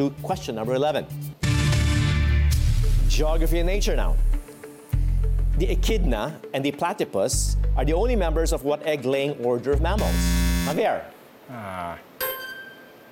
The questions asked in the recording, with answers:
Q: The echidna and the platypus are the only members of what egg-laying order of mammals?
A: Monotremes or monotremata is the correct answer.